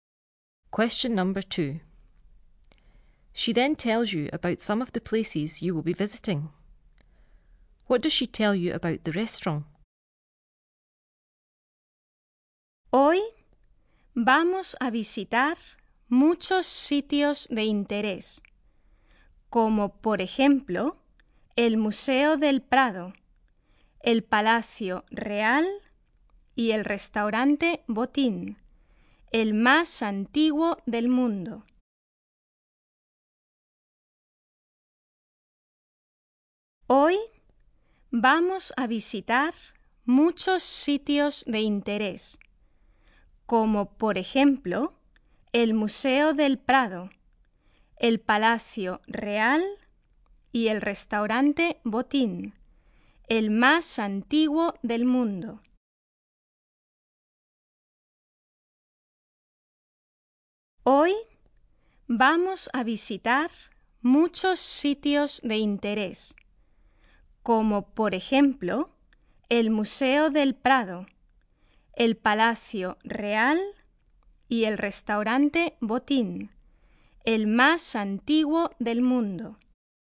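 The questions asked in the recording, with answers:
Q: What does she tell you about the restaurant?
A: It is the oldest restaurant in the world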